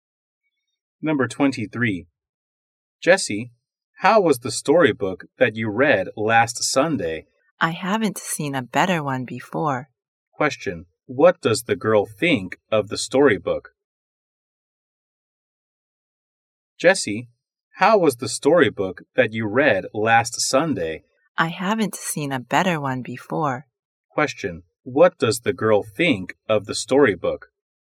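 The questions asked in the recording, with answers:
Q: What does the girl think of the storybook?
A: It's the best one she has read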